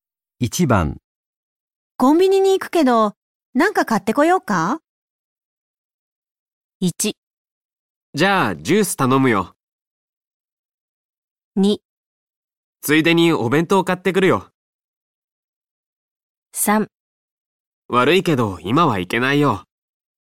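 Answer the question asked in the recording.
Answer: 1: じゃあ、ジュース頼むよ。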